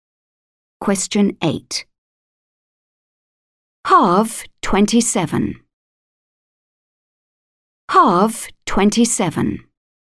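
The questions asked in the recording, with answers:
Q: Halve 27.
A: 13.5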